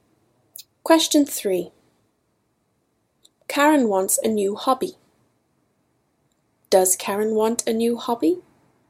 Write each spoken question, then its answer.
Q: Does Karen want a new hobby?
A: Yes, Karen wants a new hobby.